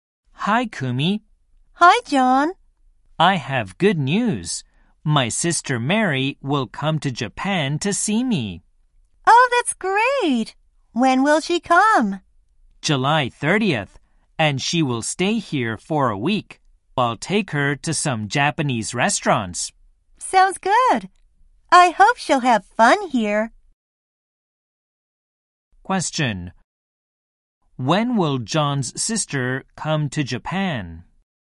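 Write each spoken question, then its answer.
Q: When will John's sister come to Japan?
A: On July 30th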